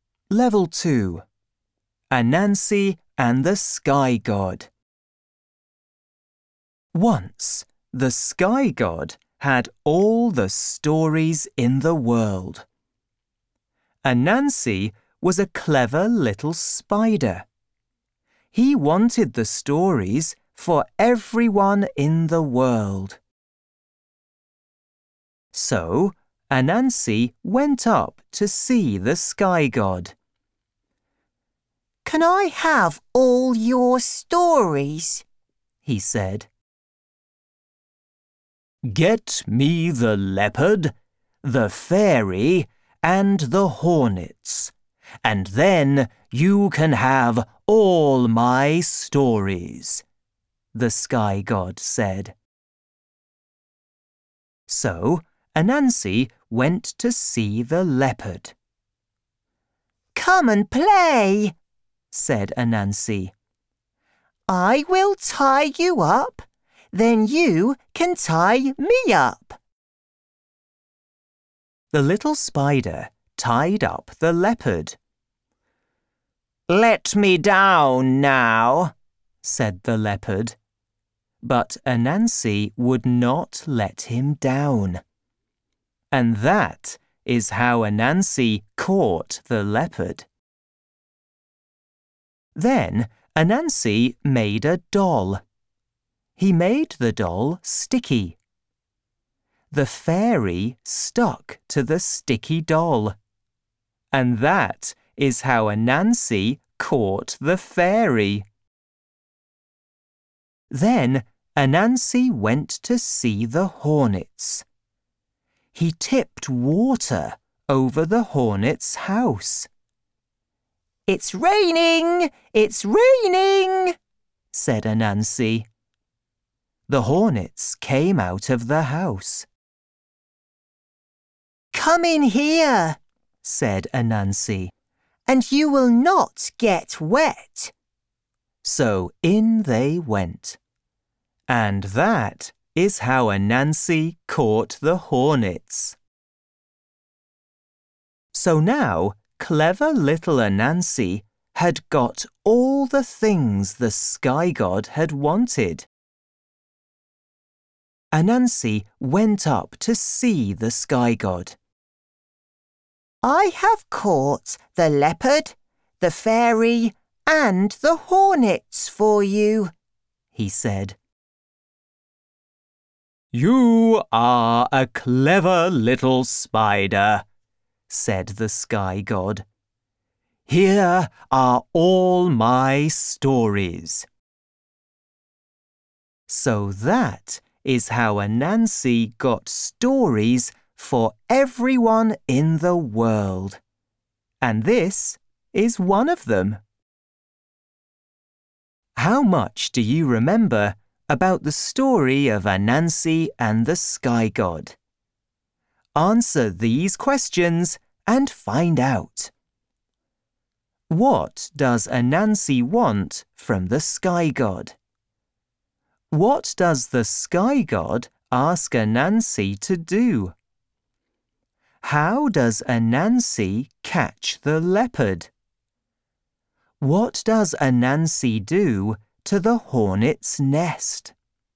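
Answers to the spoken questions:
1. All his stories
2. Get him the leopard, the fairy, and the hornets
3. He tricks it into a game and ties it up
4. He tips water over it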